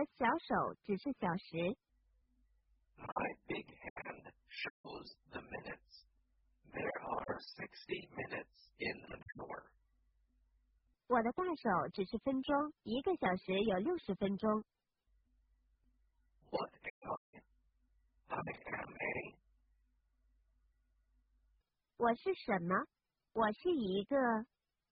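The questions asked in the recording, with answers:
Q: What am I?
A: a clock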